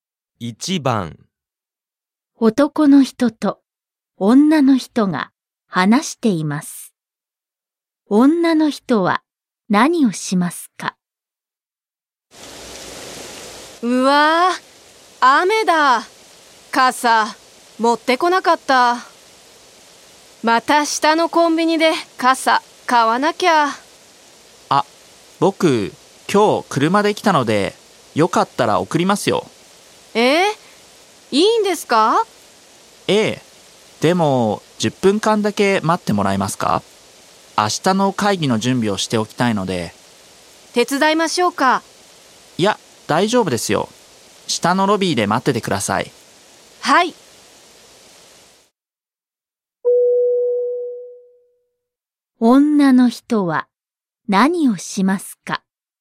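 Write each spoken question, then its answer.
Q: 女の人は何をしますか?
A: 下のロビーで10分間待つ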